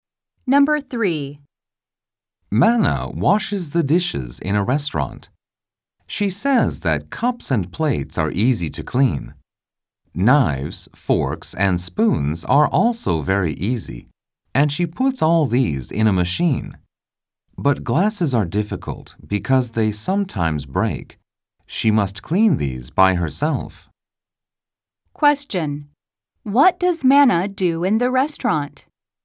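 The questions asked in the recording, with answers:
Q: What does Manna do in the restaurant?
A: She washes the dishes.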